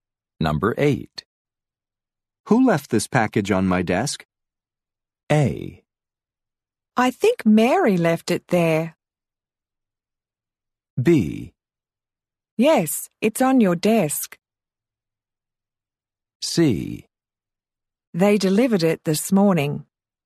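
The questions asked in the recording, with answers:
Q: Who left this package on my desk?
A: A: I think Mary left it there.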